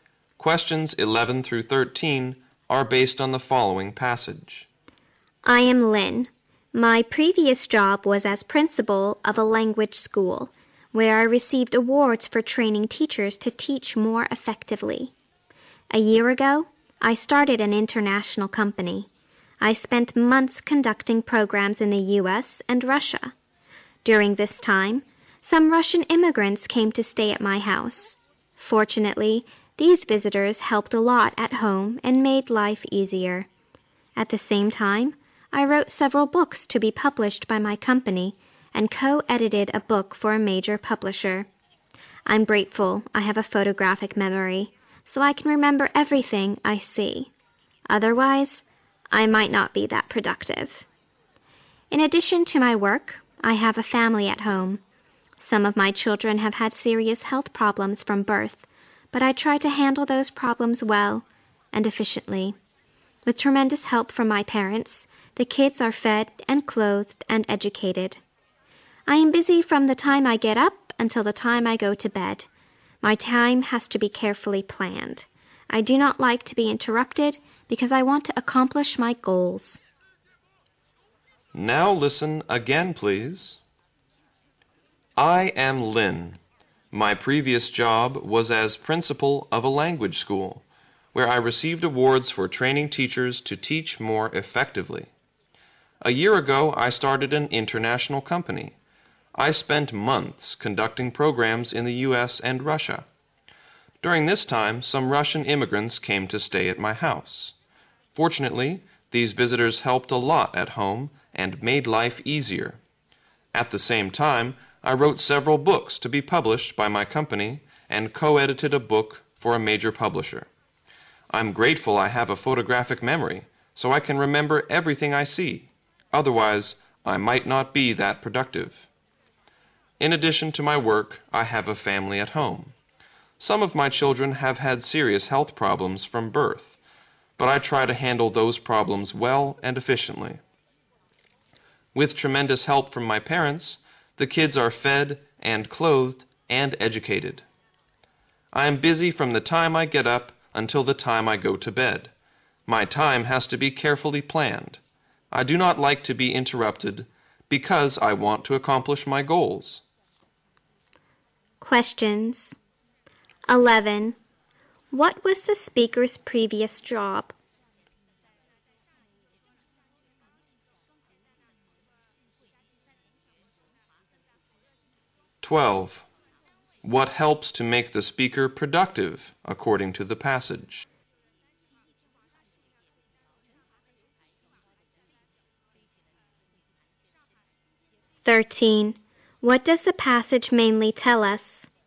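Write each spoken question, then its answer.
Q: What was the speaker's previous job?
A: Principal of a language school.

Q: What helps to make the speaker productive, according to the passage?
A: Her photographic memory.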